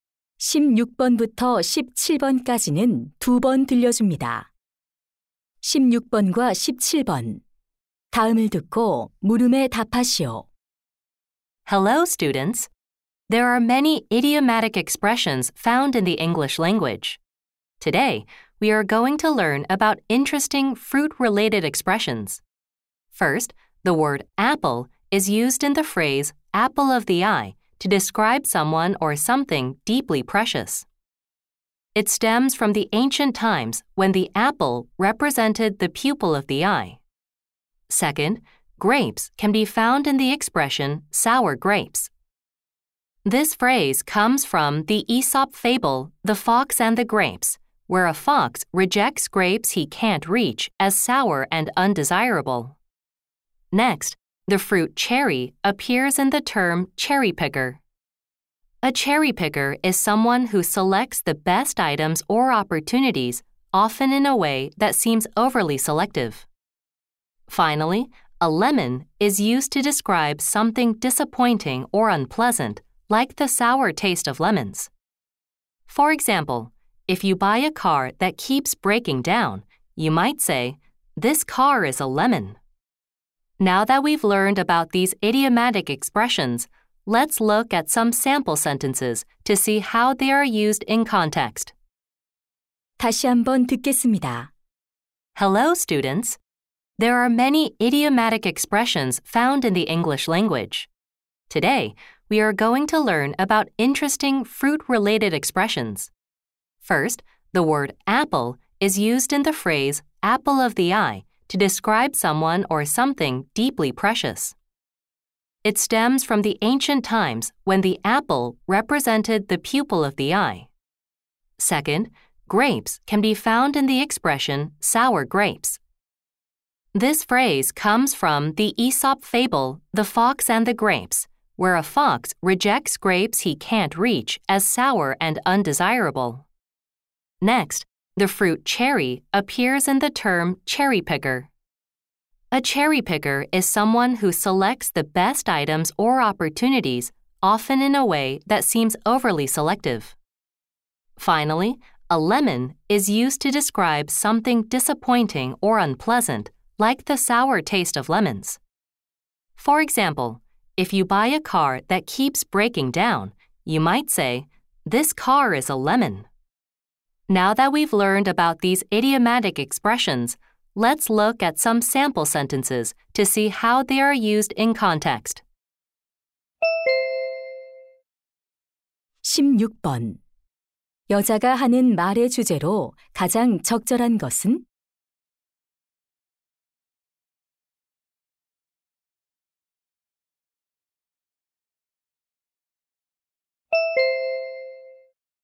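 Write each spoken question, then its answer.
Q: 여자가 하는 말의 주제로 가장 적절한 것은?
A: 과일과 관련된 영어 관용 표현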